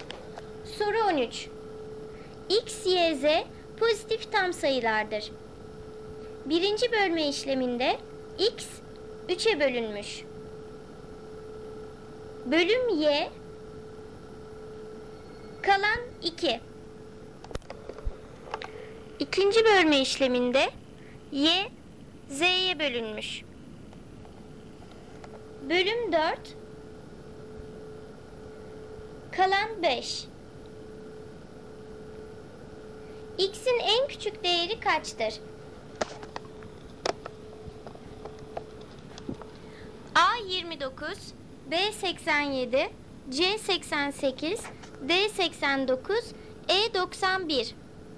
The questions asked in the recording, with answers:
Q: X'in en küçük değeri kaçtır?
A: Doğru cevap D 89.